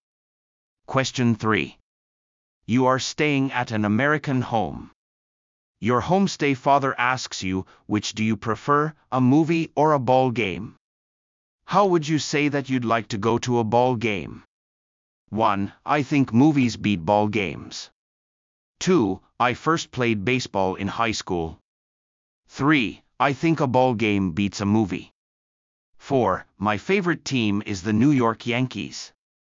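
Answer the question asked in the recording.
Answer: 3: I think a ball game beats a movie.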